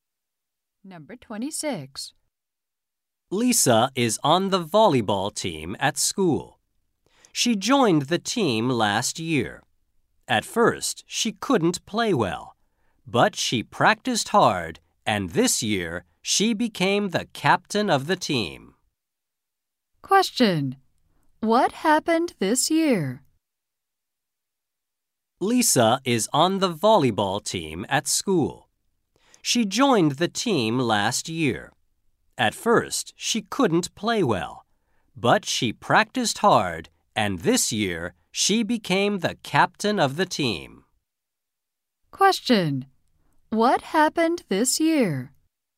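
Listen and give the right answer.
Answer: Lisa became the captain of the volleyball team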